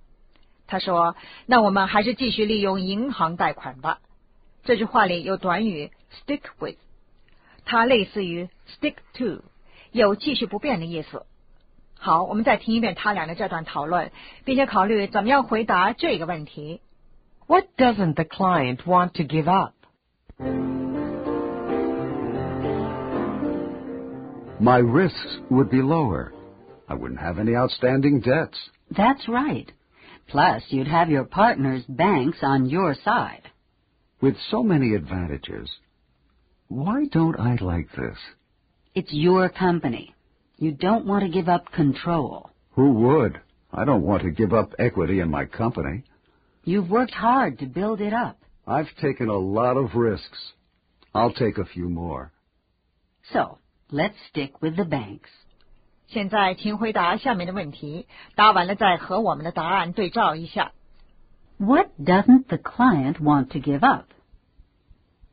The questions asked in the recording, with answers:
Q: What doesn't the client want to give up?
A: Control and equity.